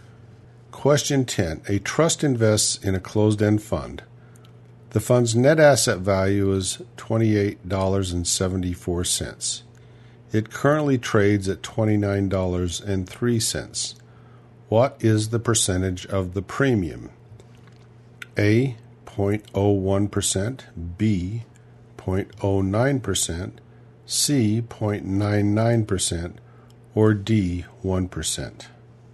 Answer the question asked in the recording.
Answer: And the answer is D, 1%.